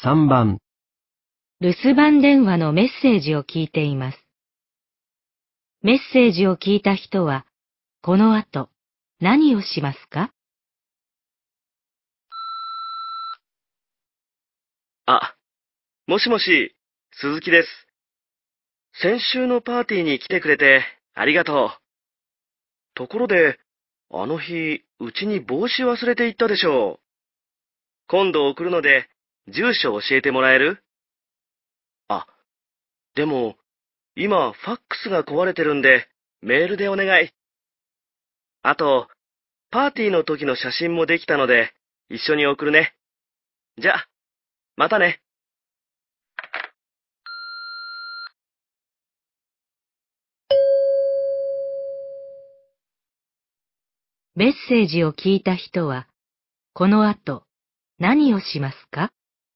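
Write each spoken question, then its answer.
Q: メッセージを聞いた人は、この後、何をしますか?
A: メールで住所を送る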